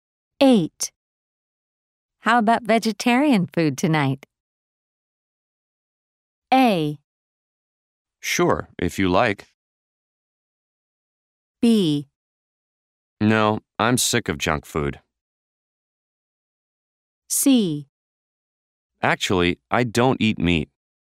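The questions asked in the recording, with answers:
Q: How about vegetarian food tonight?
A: A: Sure, if you like.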